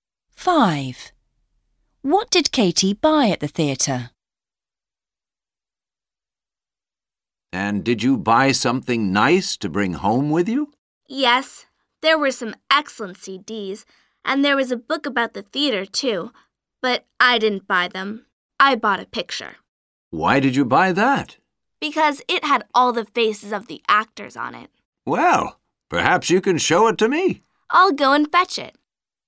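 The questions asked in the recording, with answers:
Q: What did Katie buy at the theater?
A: a picture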